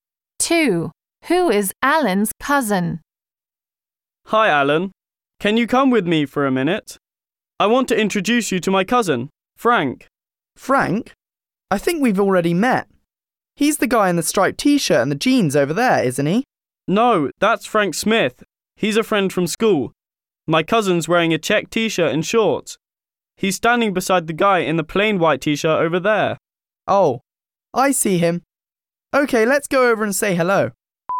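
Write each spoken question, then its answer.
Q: Who is Alan's cousin?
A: The guy in the check t-shirt and shorts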